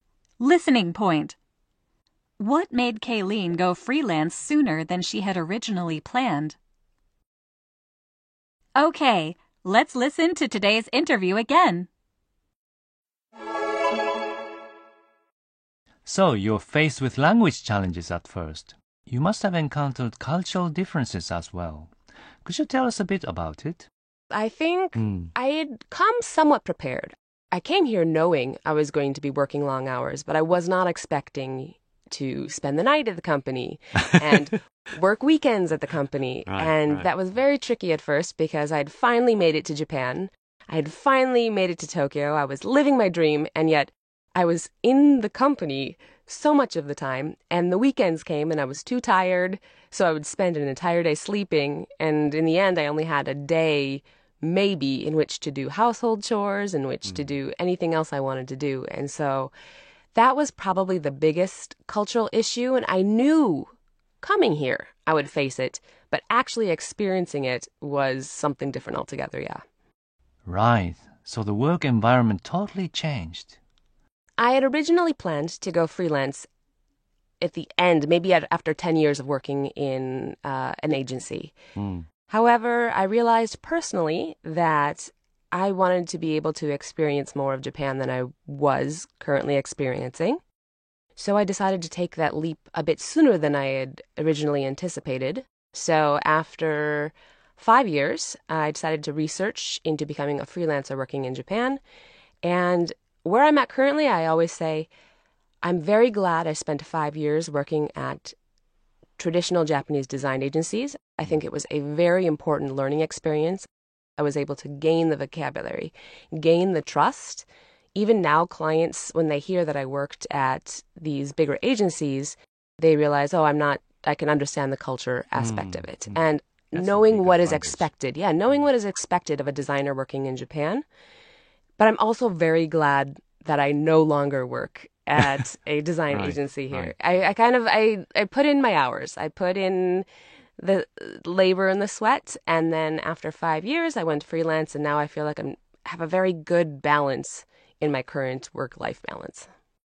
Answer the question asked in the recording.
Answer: She realized that she wanted to experience more of Japan.